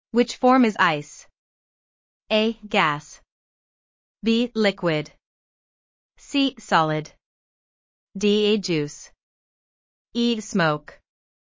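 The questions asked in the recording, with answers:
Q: Which form is ice?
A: C: Solid.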